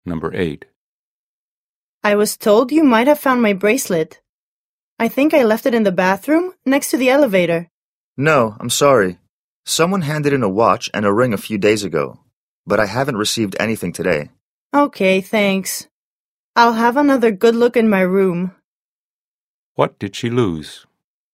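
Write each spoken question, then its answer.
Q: What did she lose?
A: Her bracelet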